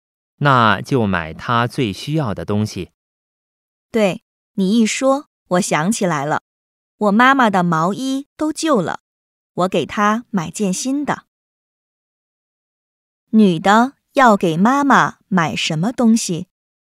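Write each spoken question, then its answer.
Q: 女的要给妈妈买什么东西?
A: 毛衣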